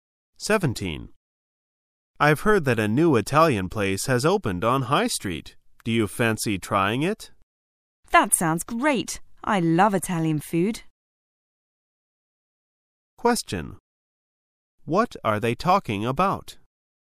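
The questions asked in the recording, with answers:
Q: What are they talking about?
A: Trying a new Italian restaurant on High Street

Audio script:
[解析] M: I've heard that a new Italian place has opened on High Street. Do you fancy trying it? W: That sounds great! I love Italian food. Q: What are they talking about?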